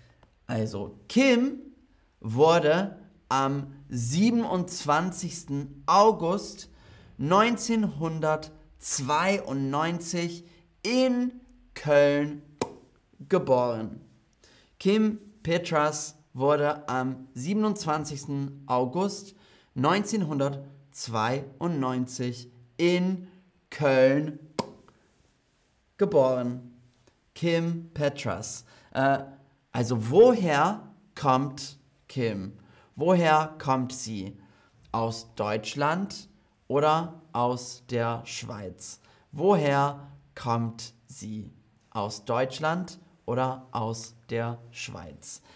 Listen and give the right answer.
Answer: Kim Petras kommt aus Deutschland.